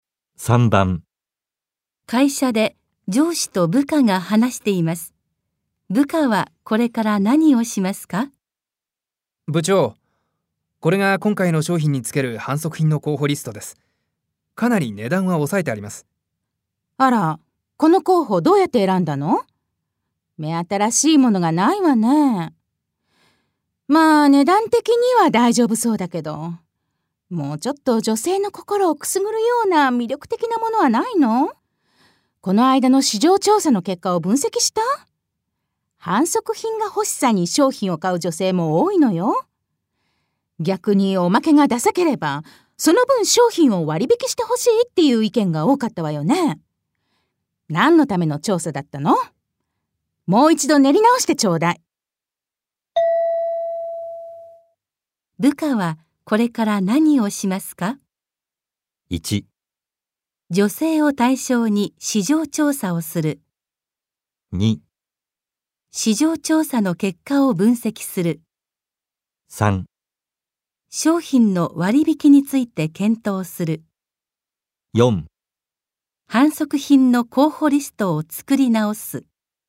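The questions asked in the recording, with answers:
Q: 部下はこれから何をしますか?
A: 4: 販促品の候補リストを作り直す。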